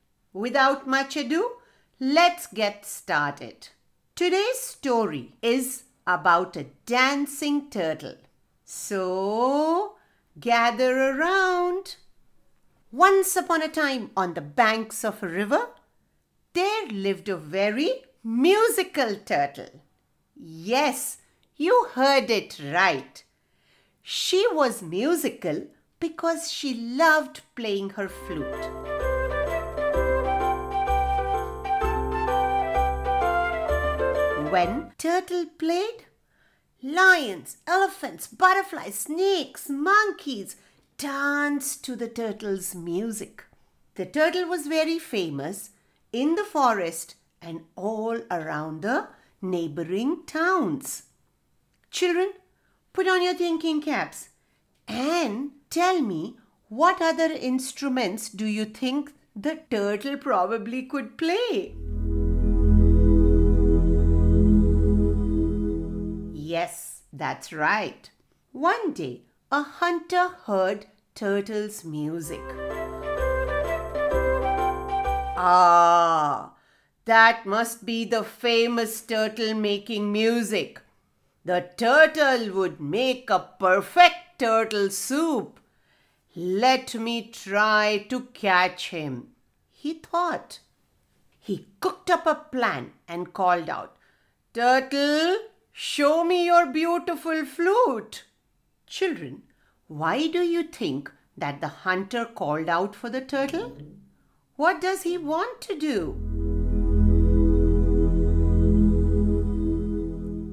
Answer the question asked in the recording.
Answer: He wanted to make a perfect turtle soup.